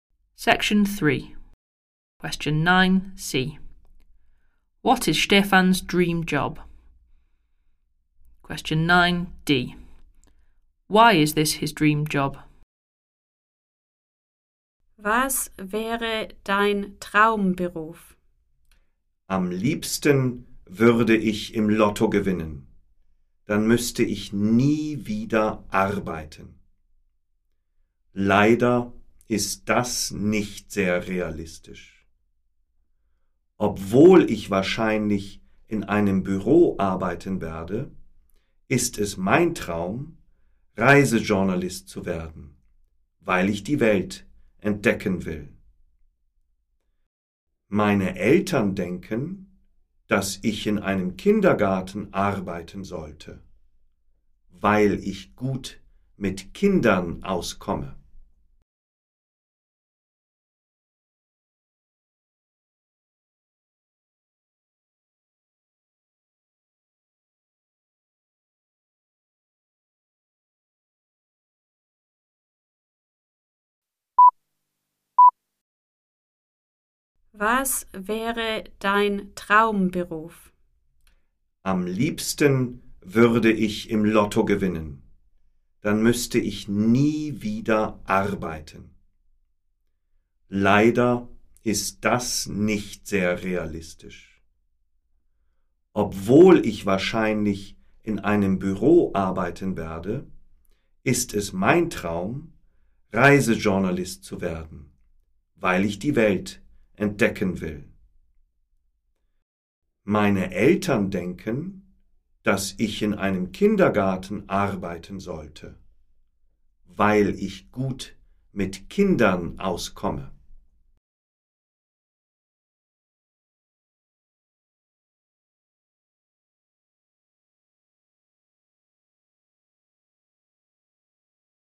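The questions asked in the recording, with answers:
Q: What is Stefan's dream job?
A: Travel journalist

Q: Why is this his dream job?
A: He wants to discover the world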